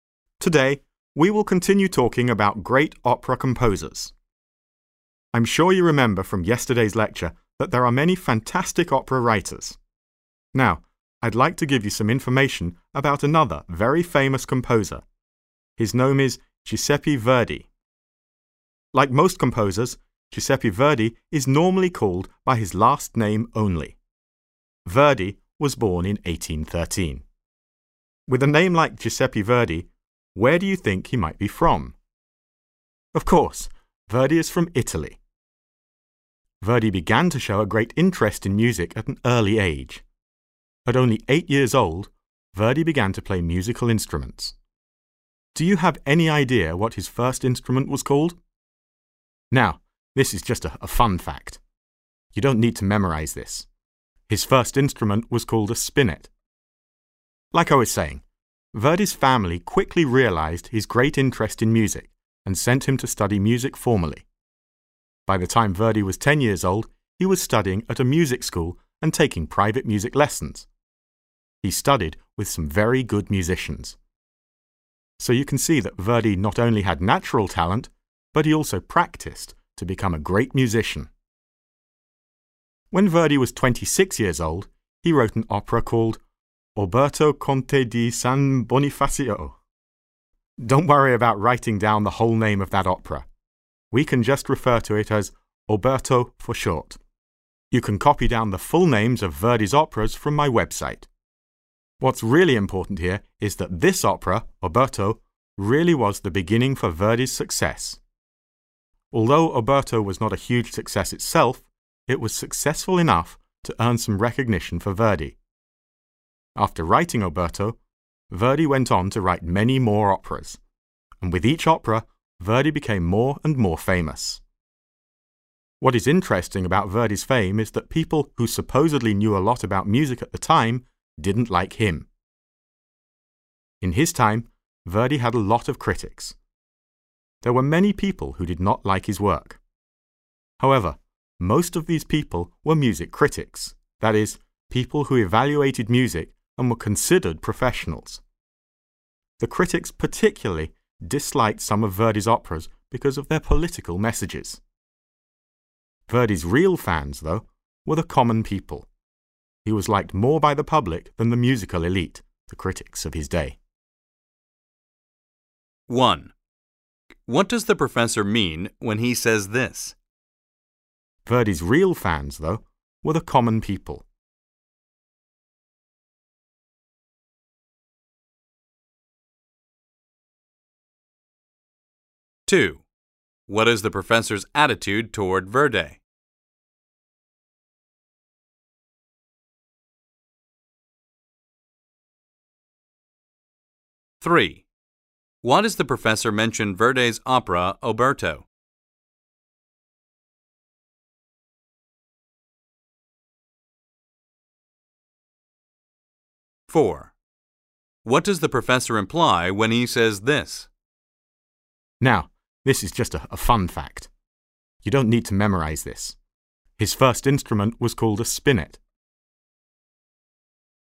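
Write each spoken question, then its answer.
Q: What does the professor mean when he says this?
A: Verdi was more popular with ordinary people than with music critics

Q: Why does the professor mention Verdi's opera, Oberto?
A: It was the beginning of Verdi's success

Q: What does the professor imply when he says this?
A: Students will not be tested on this detail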